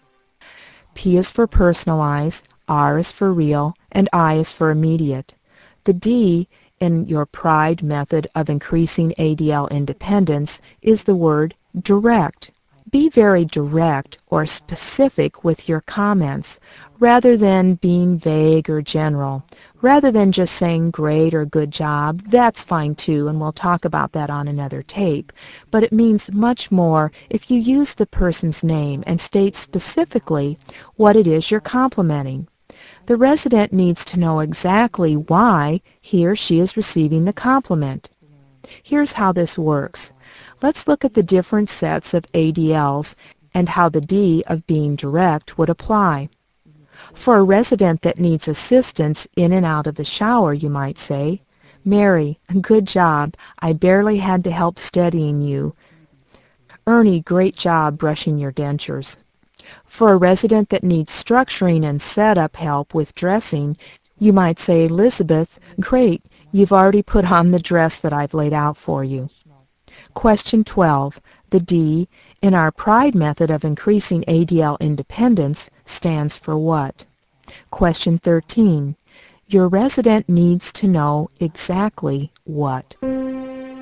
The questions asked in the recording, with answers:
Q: The D, in our PRIDE method of increasing ADL independence, stands for what?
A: D is for direct